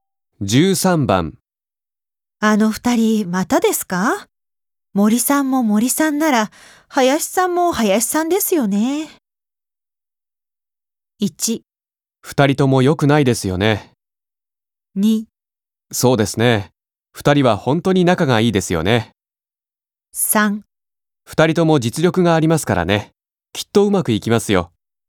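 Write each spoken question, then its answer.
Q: あの二人またですか?森さんも森さんなら林さんも林さんですよね。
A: 1: 二人とも良くないですよね。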